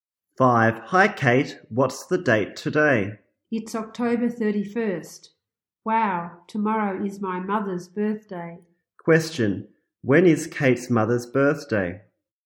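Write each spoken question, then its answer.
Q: Question. When is Kate's mother's birthday?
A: November 1st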